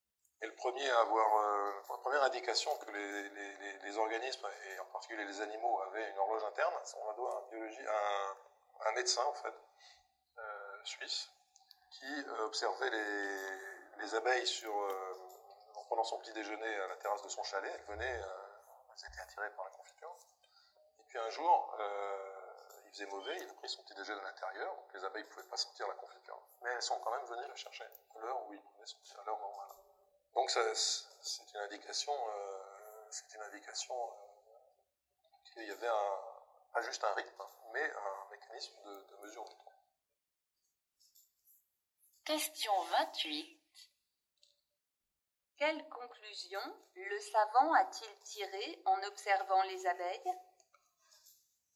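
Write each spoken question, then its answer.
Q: Quelle conclusion le savant a-t-il tirée en observant les abeilles?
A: Les abeilles ont un mécanisme interne de mesure du temps (une horloge interne).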